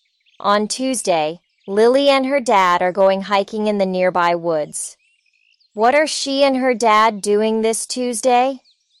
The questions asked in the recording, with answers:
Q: What are she and her dad doing this Tuesday?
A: They're going hiking.